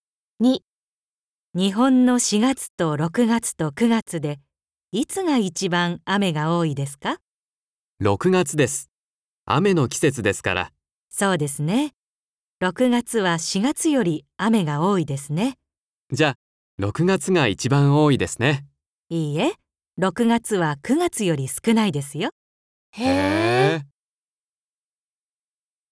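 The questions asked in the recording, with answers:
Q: 日本の4月と6月と9月でいつが一番雨が多いですか?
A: 9月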